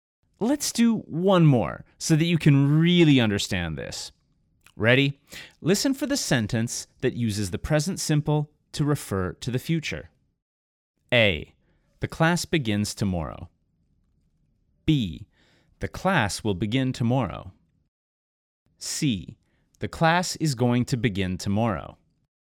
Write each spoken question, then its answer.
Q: Listen for the sentence that uses the present simple to refer to the future.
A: The answer is A.